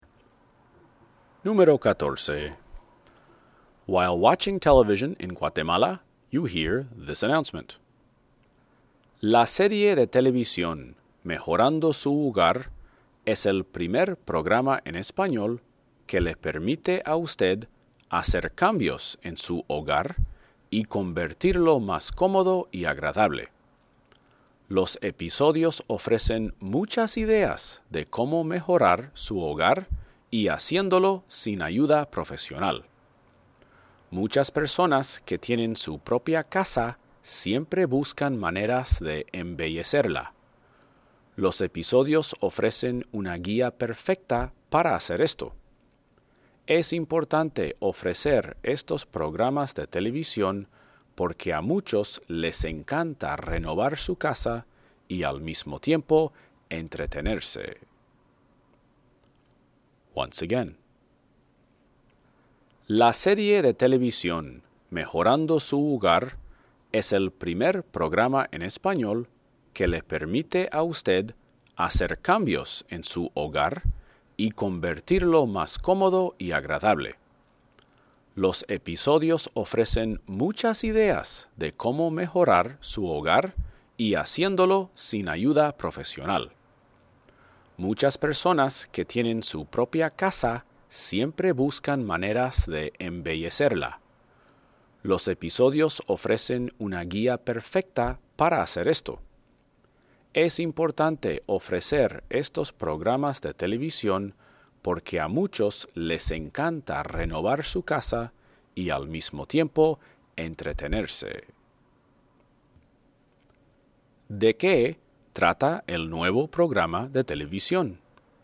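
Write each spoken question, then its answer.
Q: ¿De qué trata el nuevo programa de televisión?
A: De cómo mejorar y renovar su hogar sin ayuda profesional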